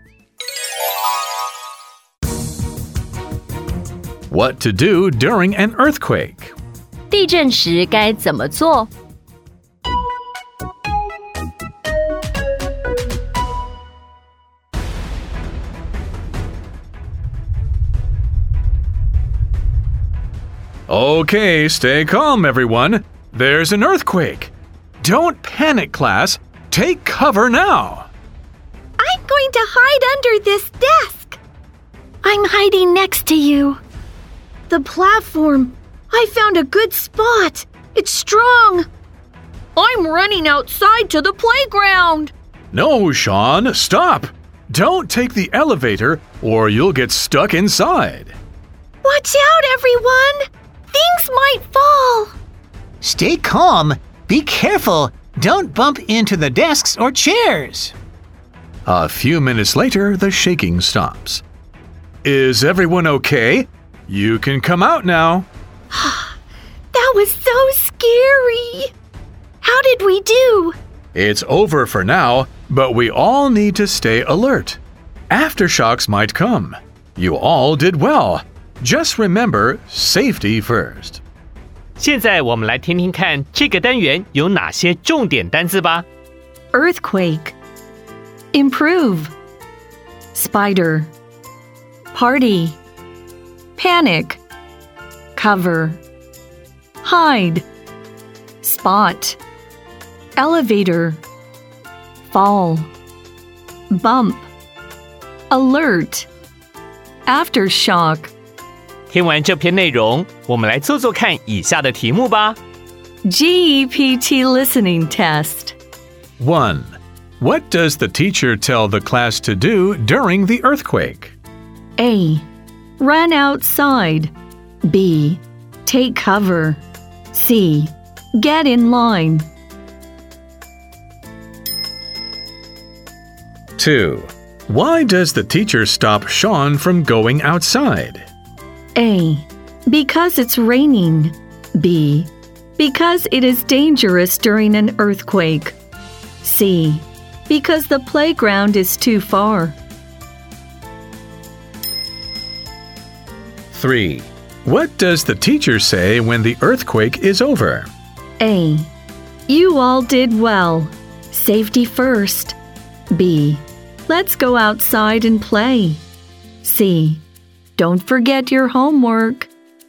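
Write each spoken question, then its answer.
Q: What does the teacher tell the class to do during the earthquake?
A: B: Take cover.

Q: Why does the teacher stop Sean from going outside?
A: B: Because it is dangerous during an earthquake.

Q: What does the teacher say when the earthquake is over?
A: A: You all did well. Safety first.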